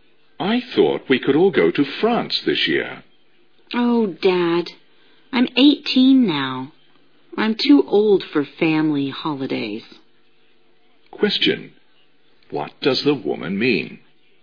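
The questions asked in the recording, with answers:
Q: What does the woman mean?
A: She doesn't want to go on a family holiday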